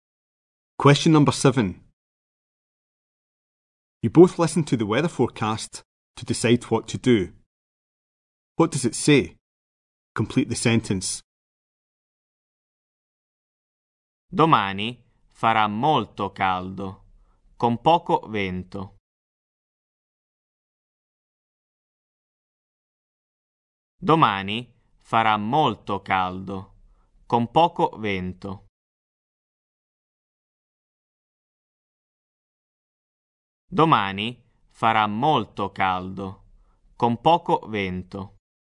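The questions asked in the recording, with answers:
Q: What does it say? Complete the sentence.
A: Tomorrow will be very hot with little wind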